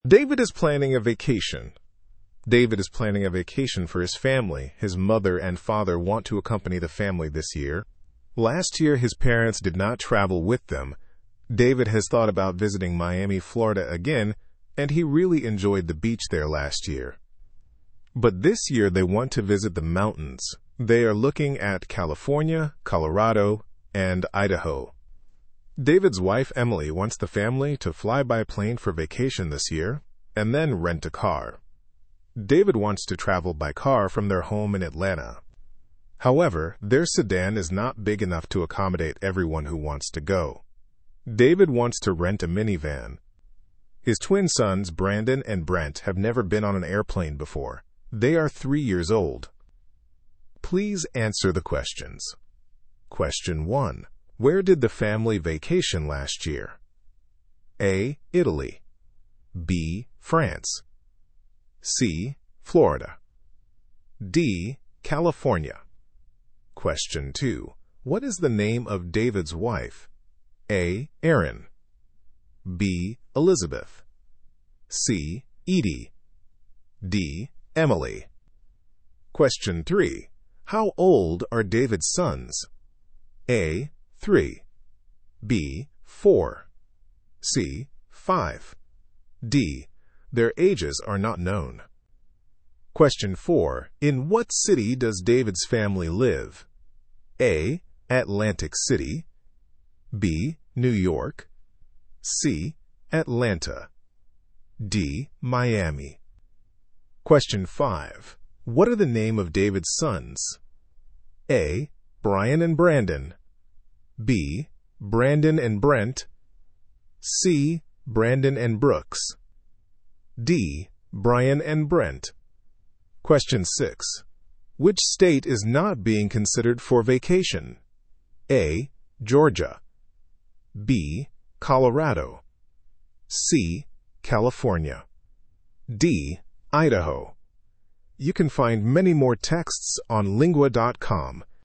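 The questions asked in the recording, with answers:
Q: Where did the family vacation last year?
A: C: Florida.

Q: What is the name of David's wife?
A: D: Emily.

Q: How old are David's sons?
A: A: 3.

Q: In what city does David's family live?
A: C: Atlanta.

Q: What are the name of David's sons?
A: B: Brandon and Brent.

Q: Which state is not being considered for vacation?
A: A: Georgia.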